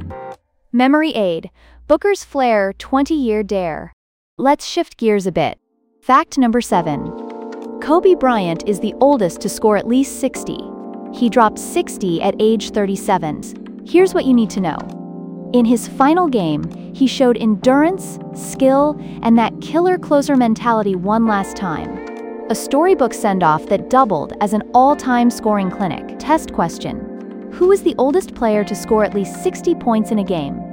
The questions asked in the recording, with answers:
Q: Who is the oldest player to score at least 60 points in a game?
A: Correct answer. Kobe Bryant.